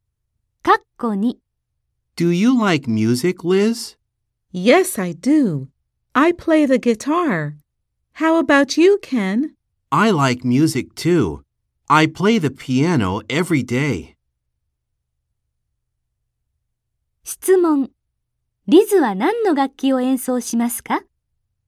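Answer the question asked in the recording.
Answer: ギター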